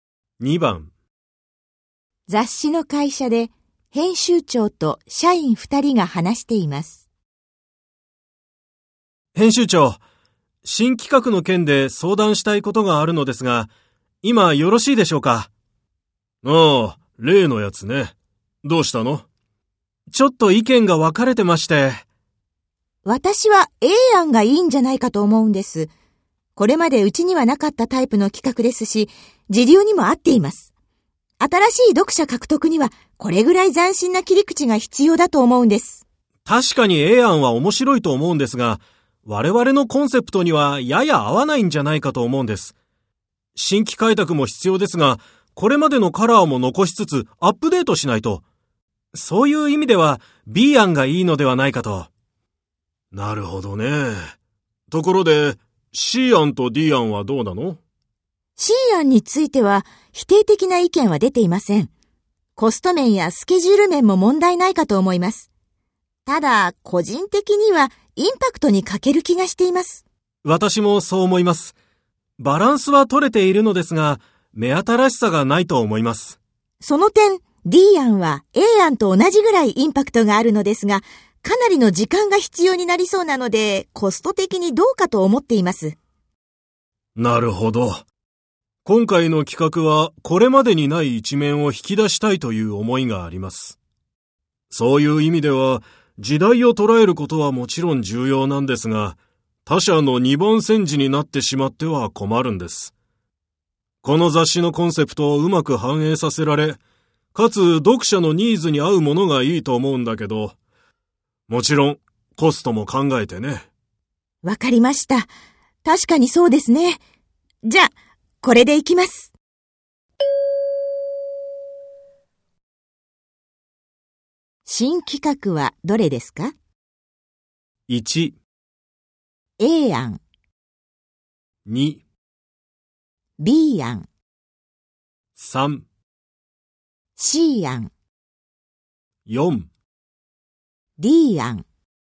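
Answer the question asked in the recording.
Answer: 2: B 案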